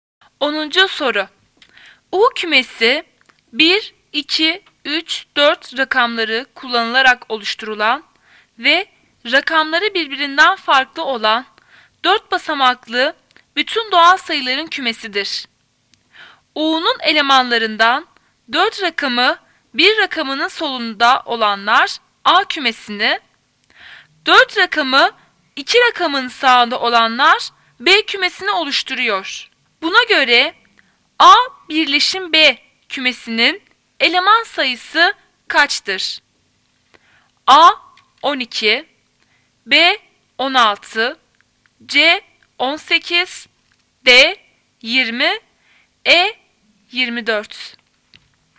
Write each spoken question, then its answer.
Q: Buna göre A birleşim B kümesinin eleman sayısı kaçtır?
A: D 20.